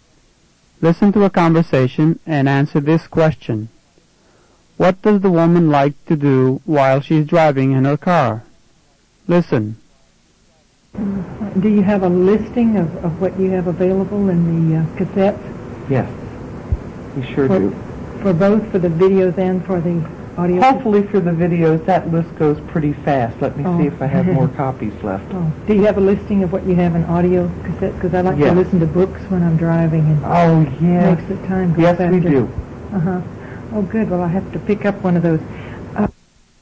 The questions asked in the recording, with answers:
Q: What does the woman like to do while she's driving in her car?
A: While she's driving her car, the woman likes to listen to books on tape.